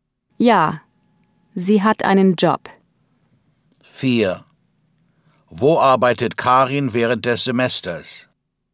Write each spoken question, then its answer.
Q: Wo arbeitet Karin während des Semesters?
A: Sie arbeitet während des Semesters in der Uni-Bibliothek.